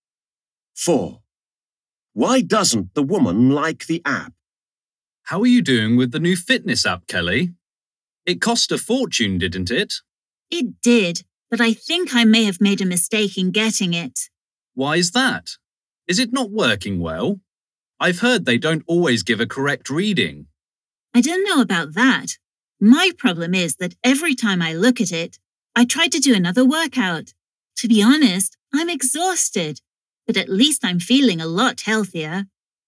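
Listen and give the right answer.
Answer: It makes her exercise too much, so she is exhausted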